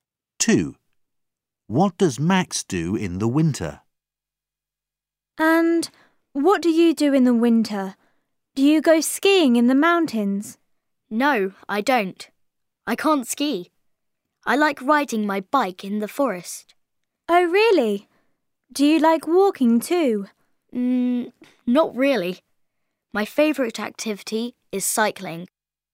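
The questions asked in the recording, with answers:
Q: What does Max do in the winter?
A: rides his bike in the forest (cycling)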